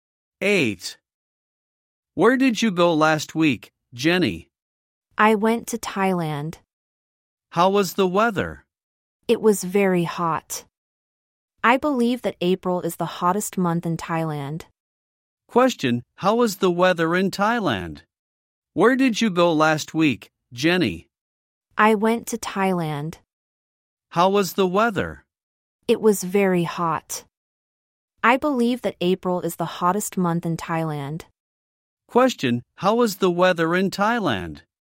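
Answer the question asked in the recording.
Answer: Very hot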